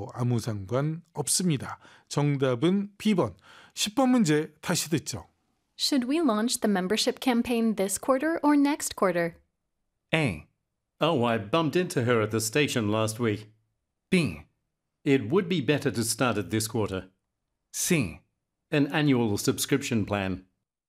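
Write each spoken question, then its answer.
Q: Should we launch the membership campaign this quarter or next quarter?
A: B: It would be better to start it this quarter.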